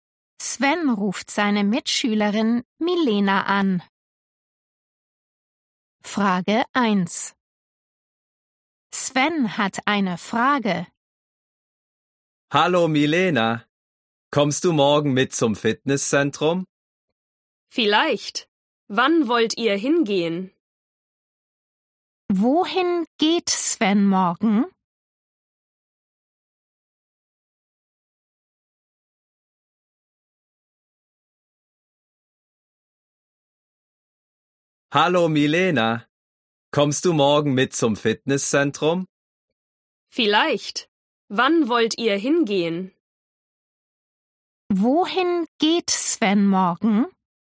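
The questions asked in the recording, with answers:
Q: Wohin geht Sven morgen?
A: zum Fitnesszentrum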